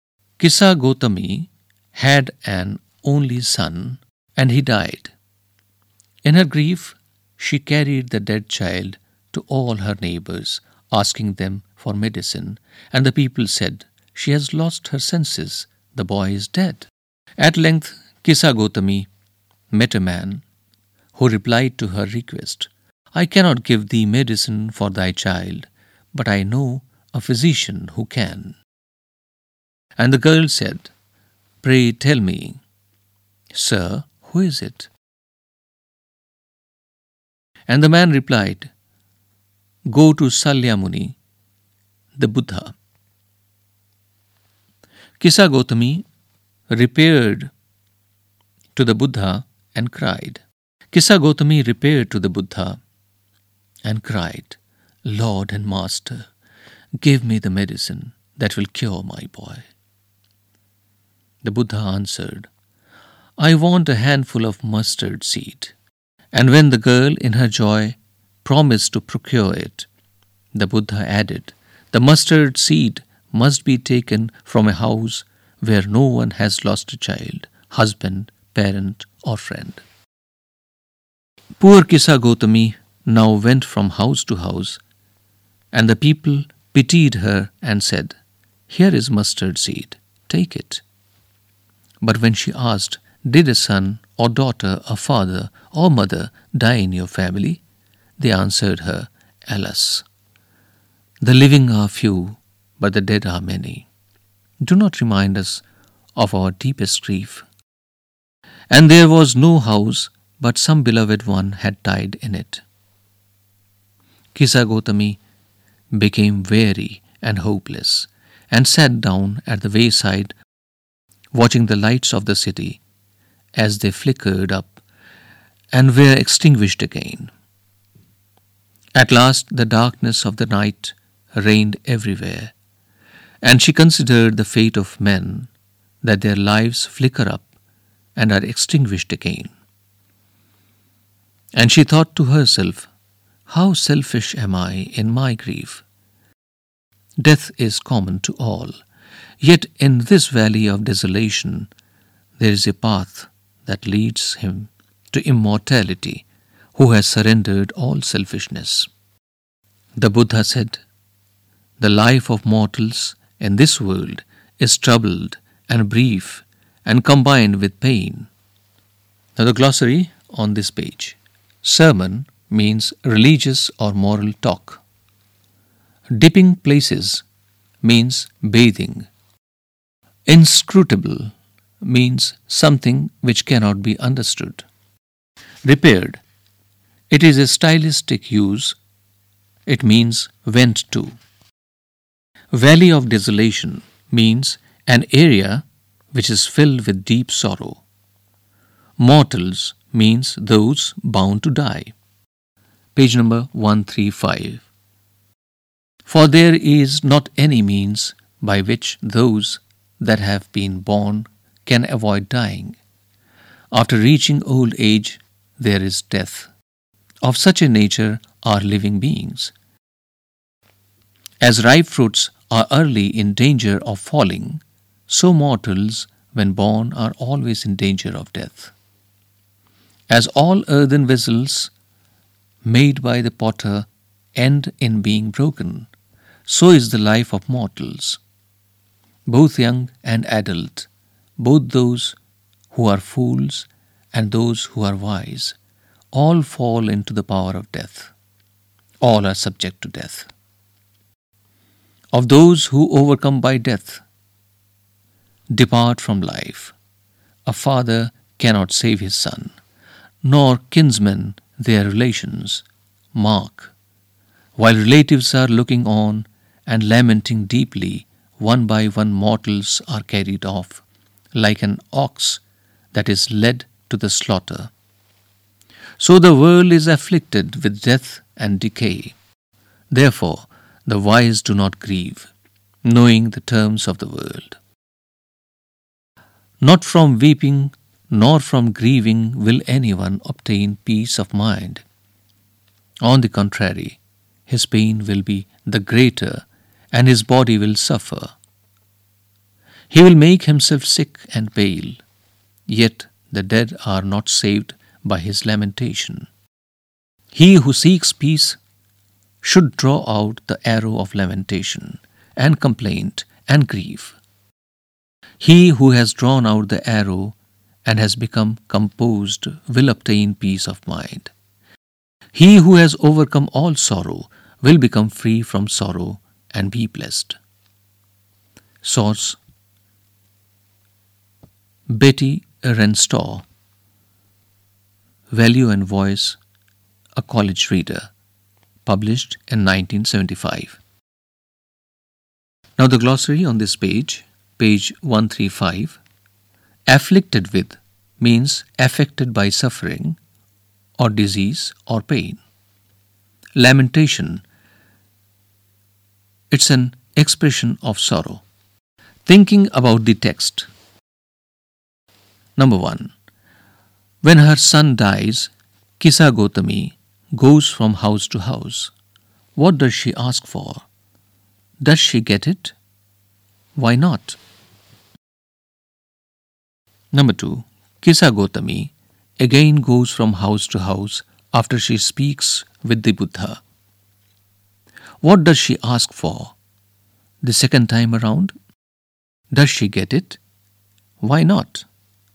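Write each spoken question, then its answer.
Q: What does she ask for?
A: Medicine for her dead child

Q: Does she get it?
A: No

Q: Why not?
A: Because the boy is already dead and no one can give medicine for him

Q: What does she ask for? The second time around?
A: Mustard seed from a house where no one has lost a child, husband, parent or friend

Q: Does she get it? Why not?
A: No, because someone had died in every house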